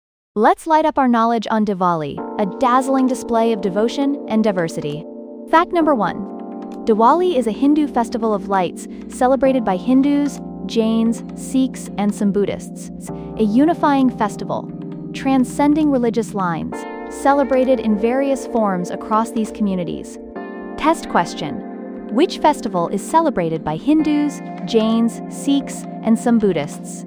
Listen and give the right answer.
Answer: Correct answer, Diwali.